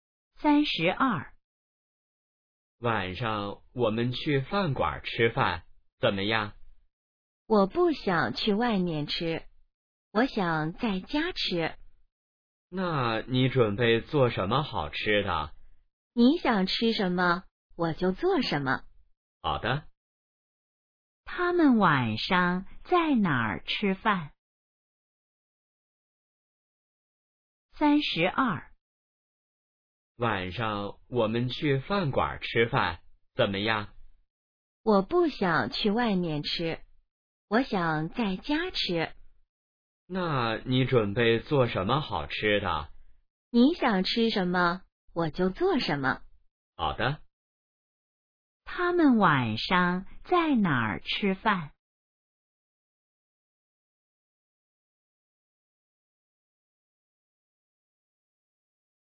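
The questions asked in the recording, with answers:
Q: 他们晚上在哪儿吃饭?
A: 在家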